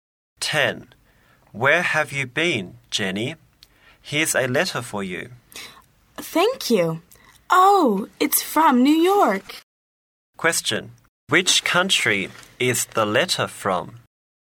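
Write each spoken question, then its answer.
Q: Which country is the letter from?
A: The USA (America)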